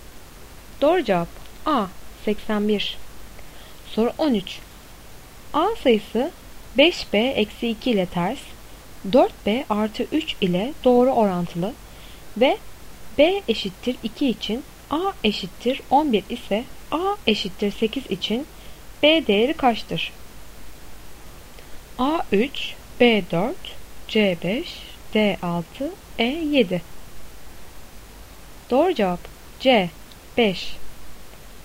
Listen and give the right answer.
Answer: Doğru cevap C 5.